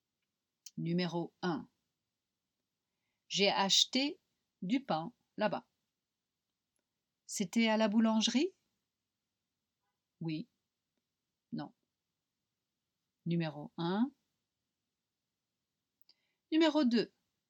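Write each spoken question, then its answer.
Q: C'était à la boulangerie?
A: Oui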